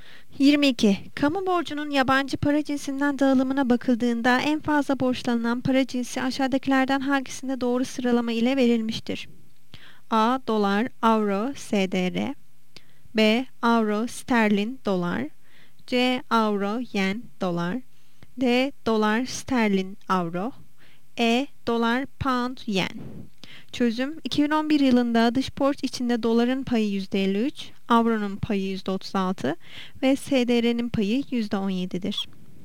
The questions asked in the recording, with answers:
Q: Kamu borcunun yabancı para cinsinden dağılımına bakıldığında en fazla borçlanan para cinsi aşağıdakilerden hangisinde doğru sıralama ile verilmiştir?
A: Yanıt A'dı.